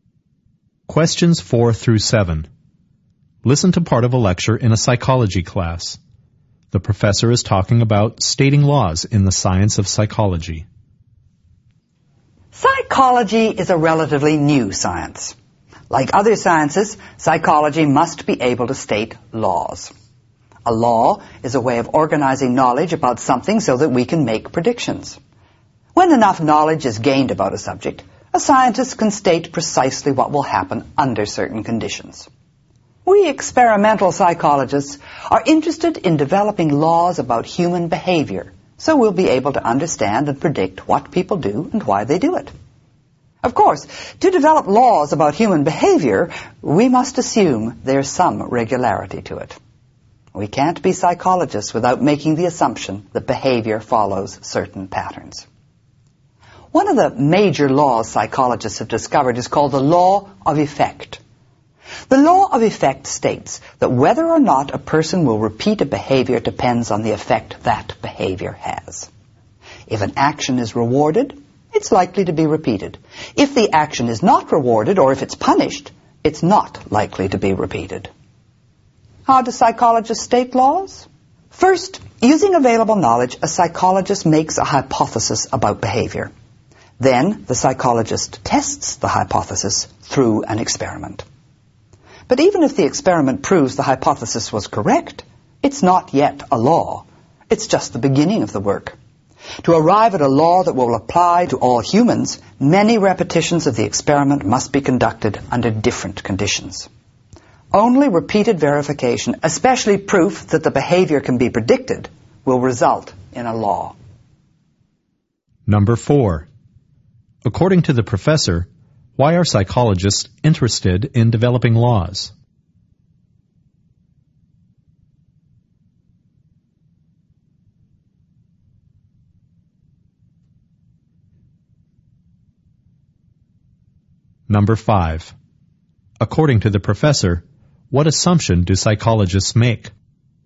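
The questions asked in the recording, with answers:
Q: According to the professor, why are psychologists interested in developing laws?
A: To understand and predict human behavior

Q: According to the professor, what assumption do psychologists make?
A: That behavior follows certain patterns (has regularity)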